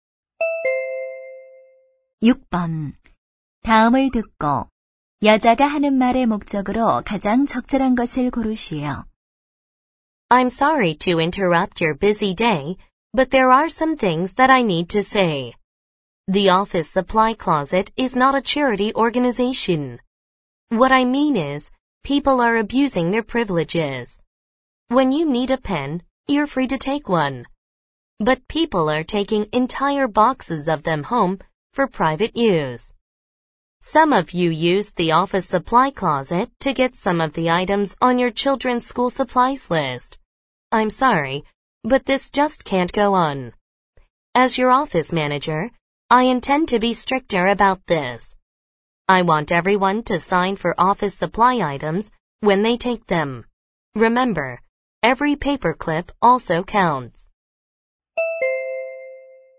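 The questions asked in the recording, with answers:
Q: 다음을 듣고 여자가 하는 말의 목적으로 가장 적절한 것을 고르시오.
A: 사무용품을 개인 용도로 가져가지 말고 가져갈 때 서명하도록 요청하려고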